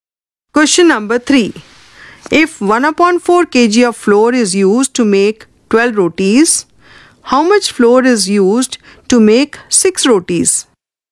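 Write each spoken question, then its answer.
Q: If 1 upon 4 kg of flour is used to make 12 rotis, how much flour is used to make 6 rotis?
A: 1/8 kg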